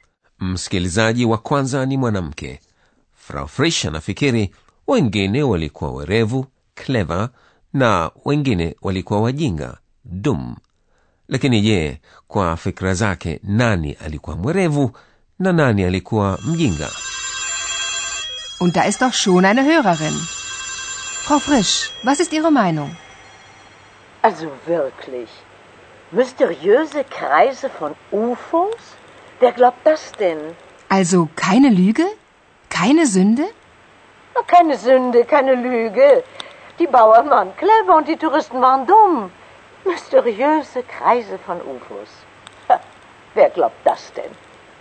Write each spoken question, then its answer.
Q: je kwa fikra zake nani alikuwa mwerevu na nani alikuwa mjinga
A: Kwa fikra za Frau Frisch, wakulima, yani Bauern, walikuwa warevu na watalii walikuwa wajinga.